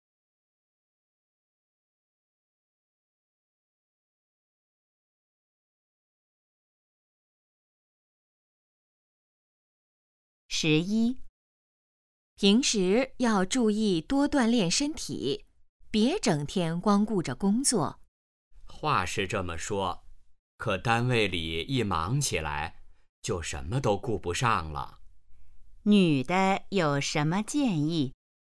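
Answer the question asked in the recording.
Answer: 多锻炼身体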